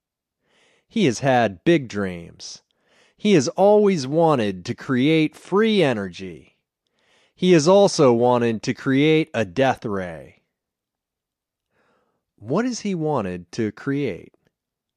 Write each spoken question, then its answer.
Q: What has he wanted to create?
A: He has wanted to create free energy and a death ray.